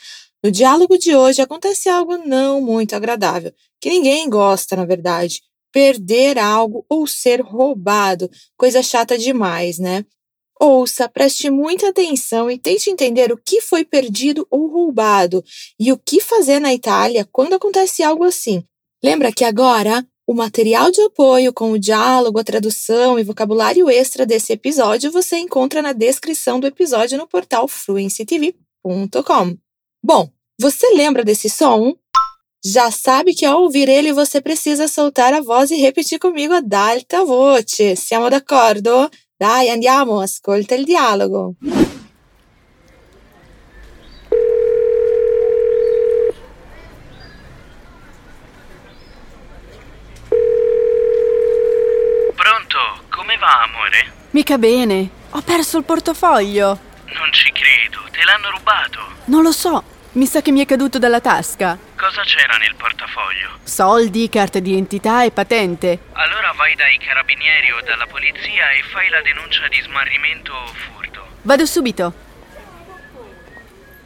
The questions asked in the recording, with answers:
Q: tente entender o que foi perdido ou roubado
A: Parece que a Valéria perdeu a carteira

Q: o que fazer na Itália quando acontece algo assim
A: Então, vai até a polícia e faz o BO de perda ou roubo, tá bom?